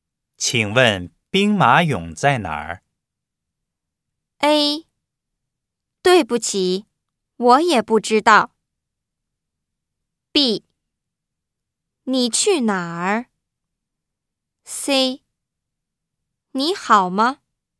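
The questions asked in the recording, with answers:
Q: 请问兵马俑在哪儿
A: A: 对不起,我也不知道。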